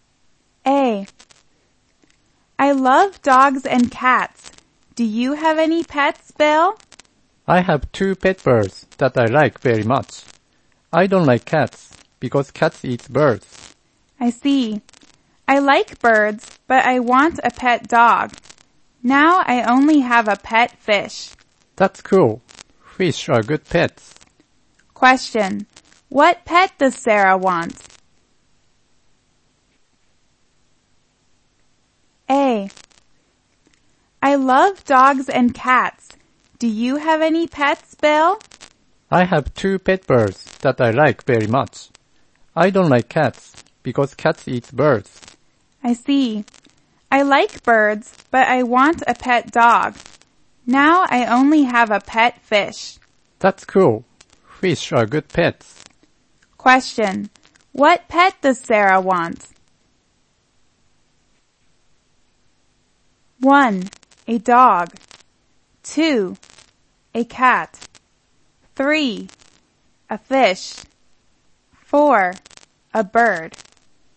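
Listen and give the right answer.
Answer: 1: A dog.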